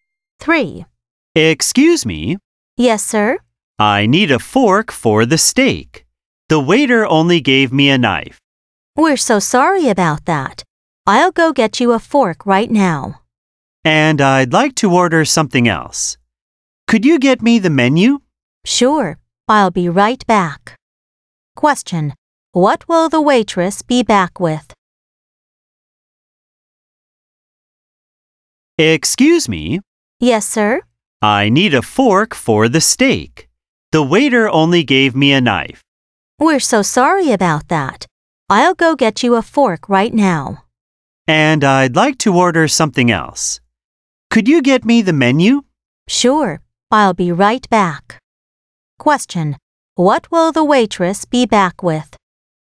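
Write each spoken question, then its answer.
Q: What will the waitress be back with?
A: A fork and the menu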